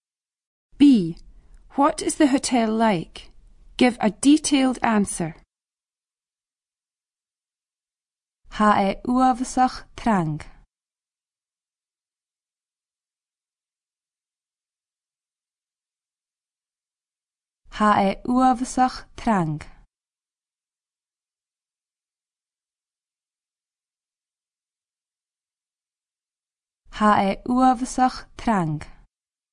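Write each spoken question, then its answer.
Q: What is the hotel like?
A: Very busy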